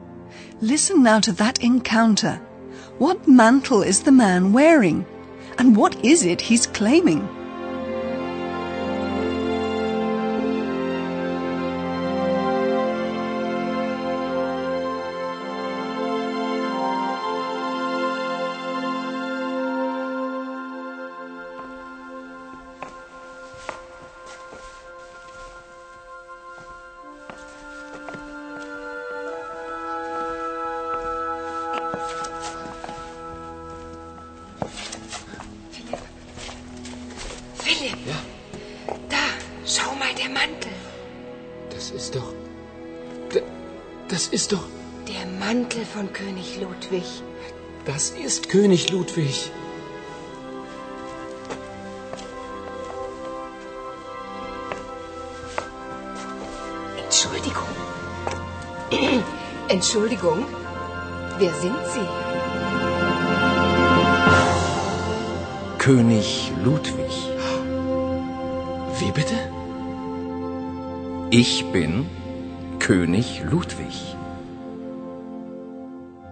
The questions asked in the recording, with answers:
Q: What mantle is the man wearing?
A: Philip and Paula are stunned to see the man wearing the mantle of King Ludwig.

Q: And what is it he's claiming?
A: Imagine the two reporters' astonishment when they hear the man claim to be King Ludwig.